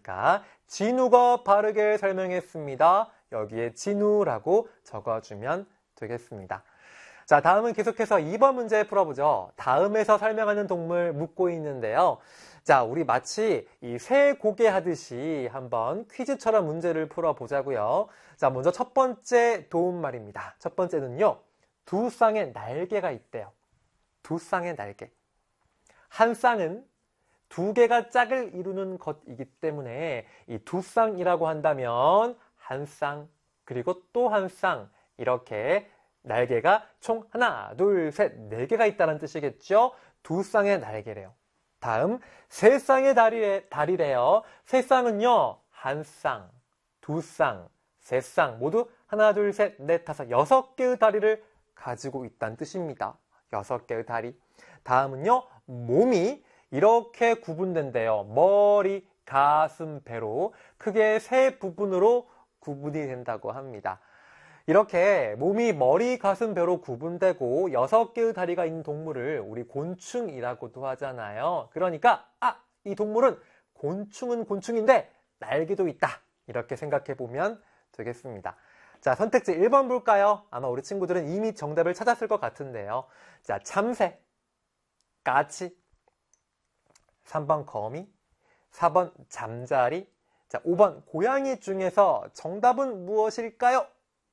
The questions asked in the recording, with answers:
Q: 자, 참새, 까치, 3번 거미, 4번 잠자리, 자, 5번 고양이 중에서 정답은 무엇일까요?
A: 바로 정답은 잠자리였습니다.